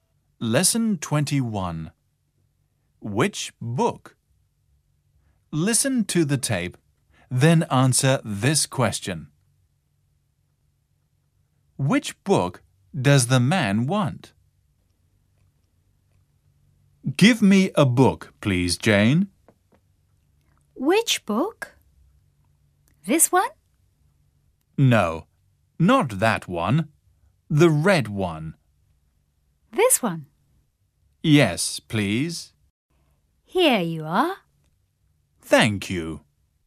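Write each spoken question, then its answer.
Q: Which book does the man want?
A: The red one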